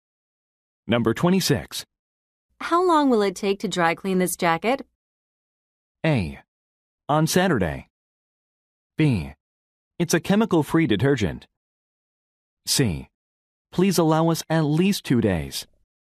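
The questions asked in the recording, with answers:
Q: How long will it take to dry clean this jacket?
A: C: Please allow us at least 2 days.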